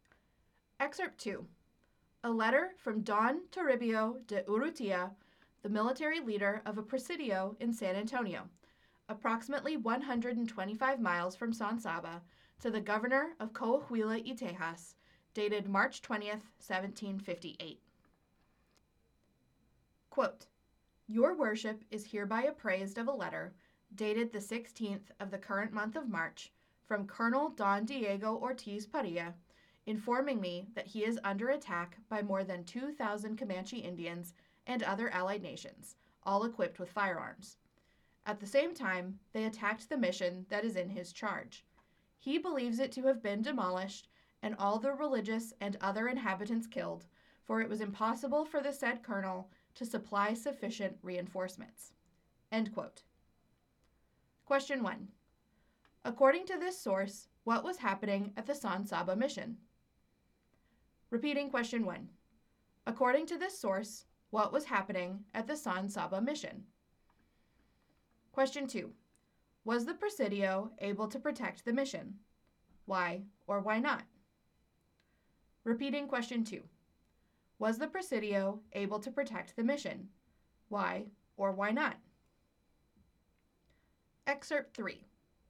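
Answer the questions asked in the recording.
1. It was attacked by over 2,000 Comanche and allies
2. No; it could not send enough reinforcements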